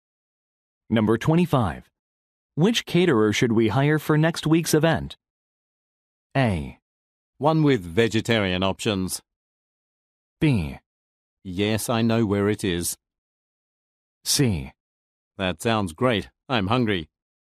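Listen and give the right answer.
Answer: A: One with vegetarian options.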